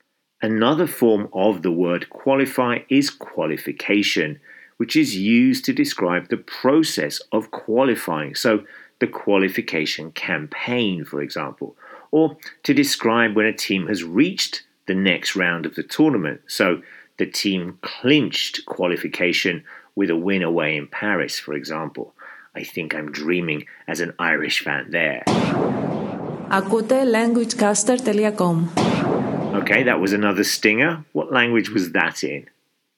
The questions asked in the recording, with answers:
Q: What language was that in?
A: Greece